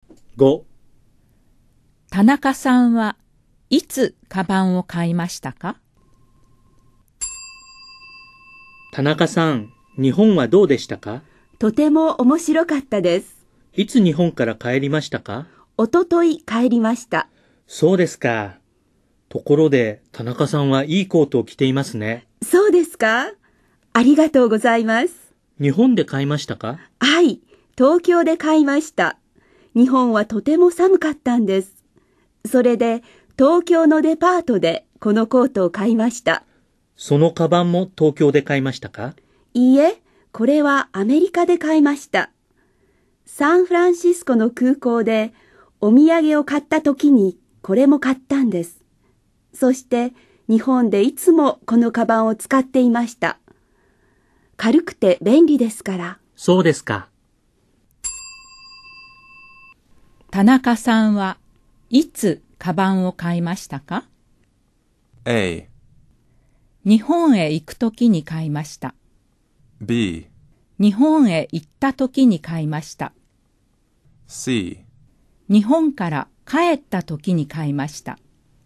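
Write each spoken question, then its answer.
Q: 田中さんはいつカバンを買いましたか?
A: A: 日本へ行くときに買いました。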